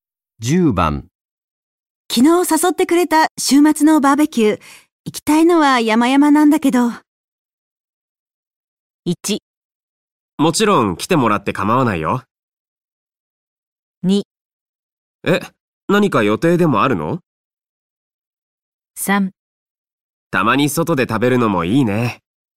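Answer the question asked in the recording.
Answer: 2: え、何か予定でもあるの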